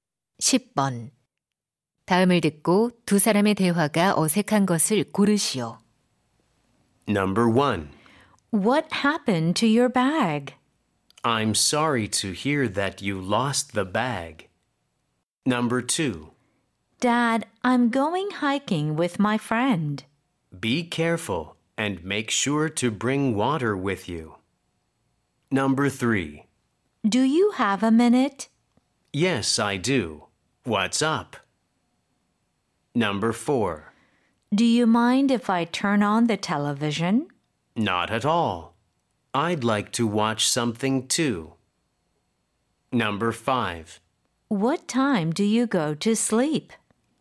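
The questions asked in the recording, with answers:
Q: 다음을 듣고 두 사람의 대화가 어색한 것을 고르시오.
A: 1: What happened to your bag? / I'm sorry to hear that you lost the bag.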